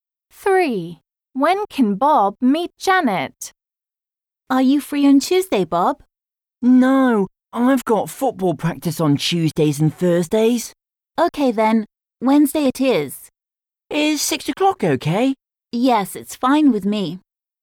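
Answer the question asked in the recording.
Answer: Wednesday at 6 o'clock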